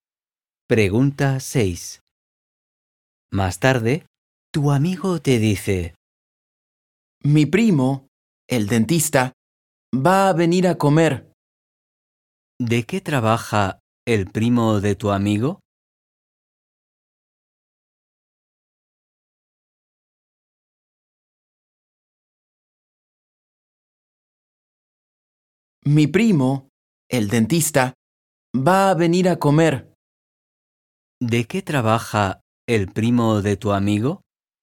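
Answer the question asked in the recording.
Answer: es dentista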